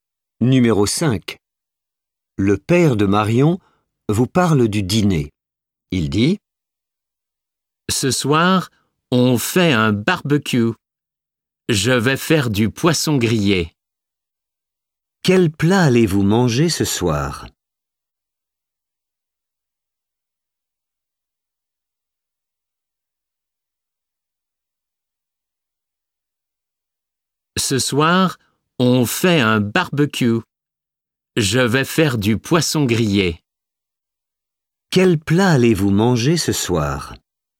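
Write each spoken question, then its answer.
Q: Quel plat allez-vous manger ce soir ?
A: Du poisson grillé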